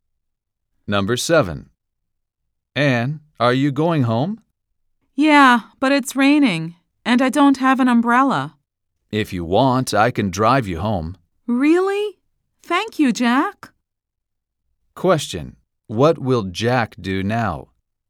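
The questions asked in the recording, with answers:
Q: What will Jack do now?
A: Drive Anne home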